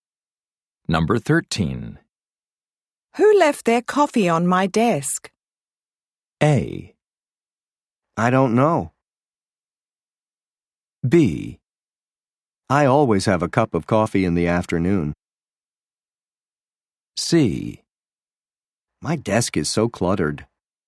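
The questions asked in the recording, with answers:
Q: Who left their coffee on my desk?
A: A: I don't know.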